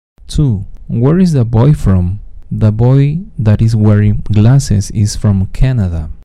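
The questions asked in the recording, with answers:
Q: Where is the boy from?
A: Canada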